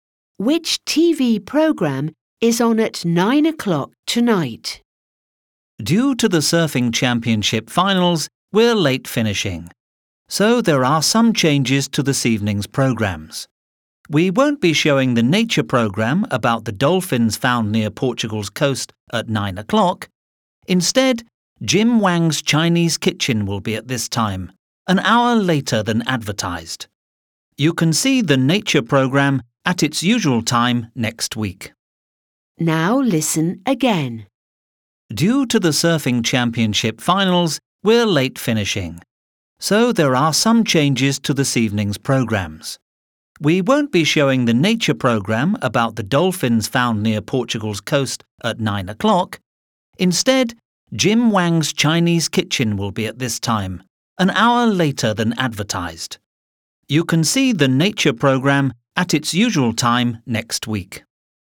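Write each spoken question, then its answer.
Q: Which TV program is on at 9 o'clock tonight?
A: Jim Wang's Chinese Kitchen (a cooking program)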